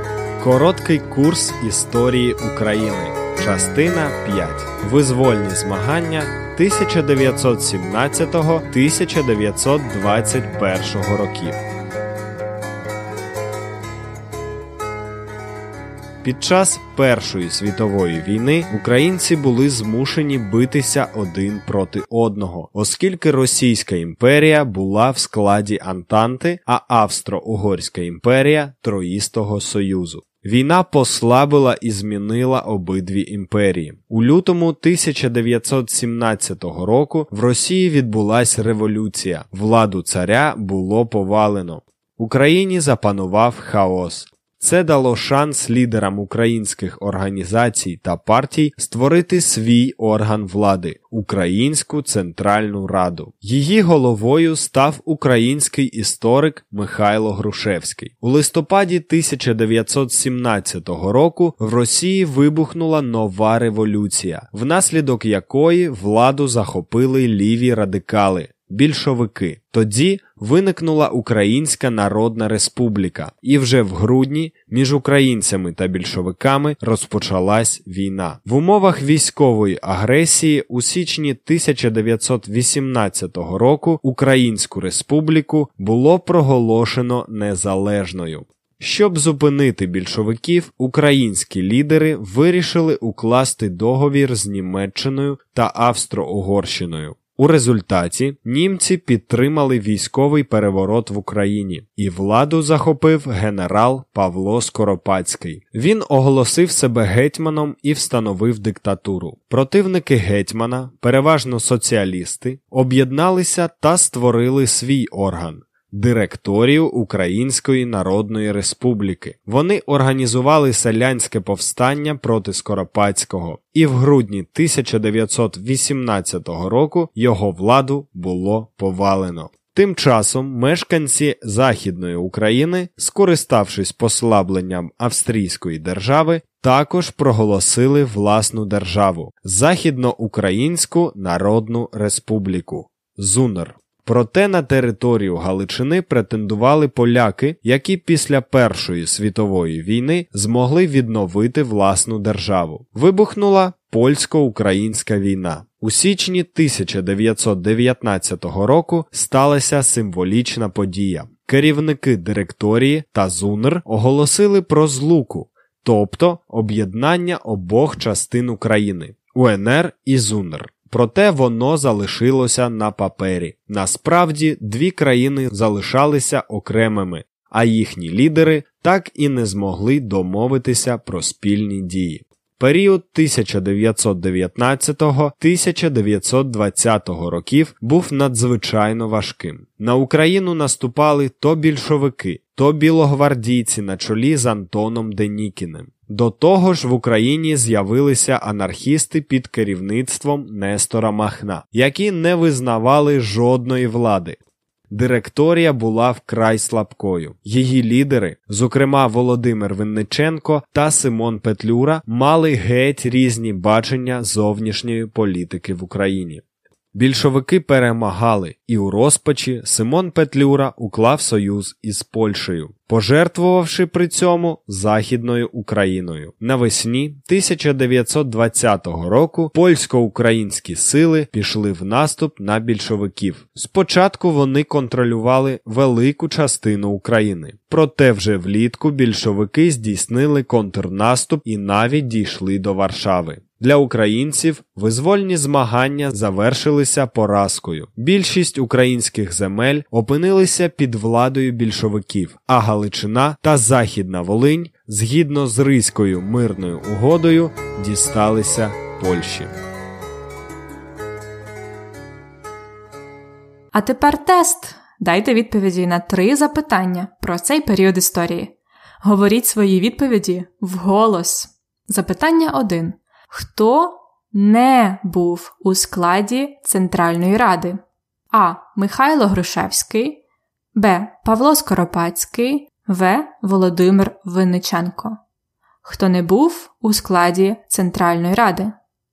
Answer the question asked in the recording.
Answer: Правильна відповідь Б. Павло Скоропадський не був у Центральній Раді